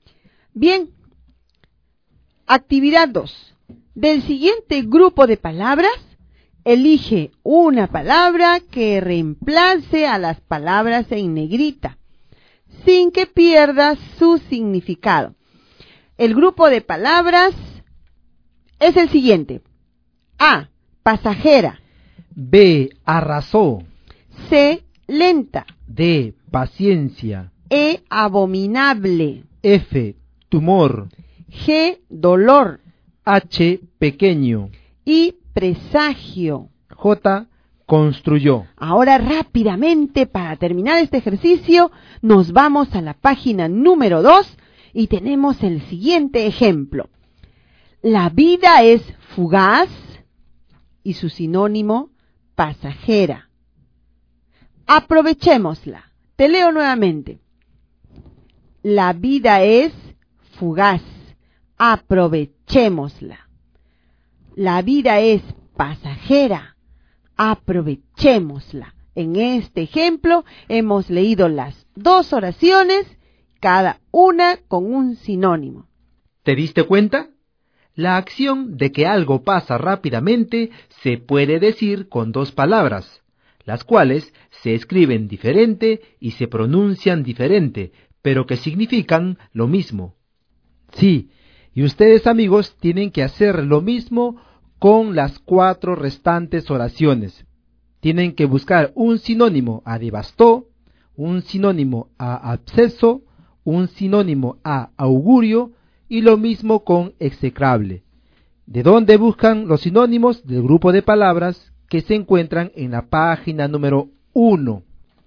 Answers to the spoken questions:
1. El sinónimo era arrasó.
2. Y el sinónimo de absceso es tumor.
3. Y el sinónimo de augurio es presagio.
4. Y el sinónimo de execrable es abominable.